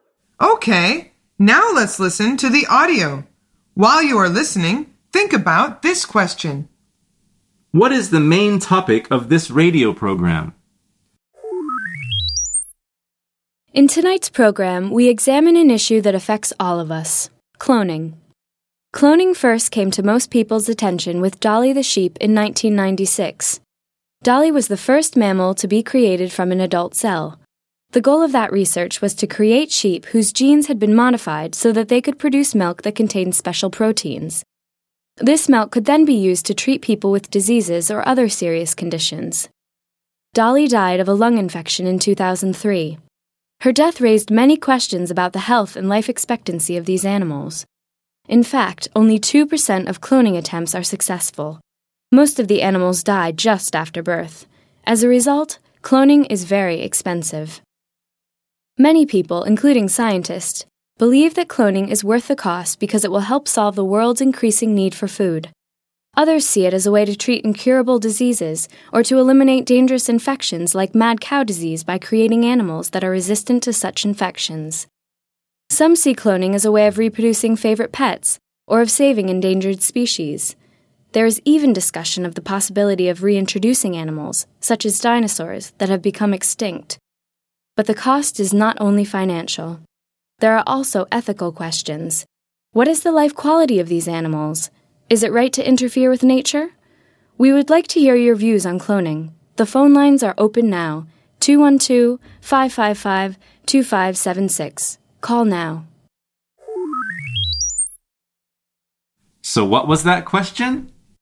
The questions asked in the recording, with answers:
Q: What is the main topic of this radio program?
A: The answer is cloning.